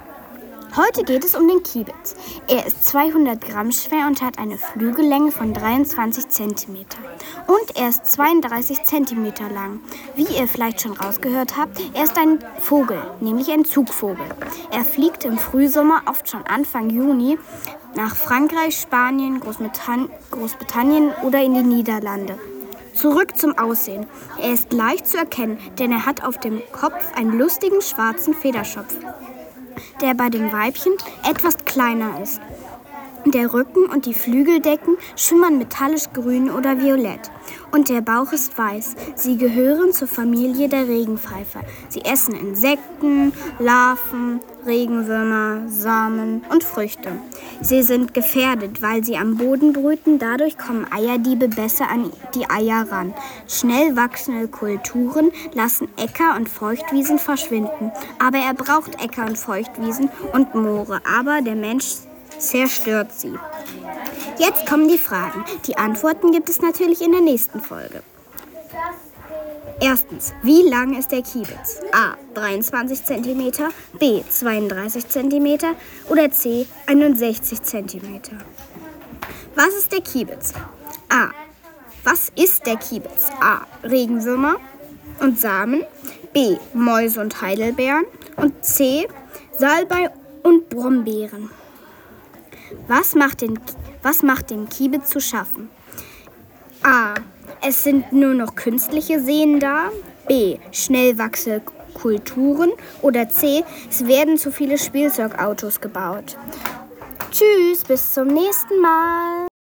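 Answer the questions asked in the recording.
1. B: 32 cm
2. A: Regenwürmer und Samen
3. B: Schnell wachsende Kulturen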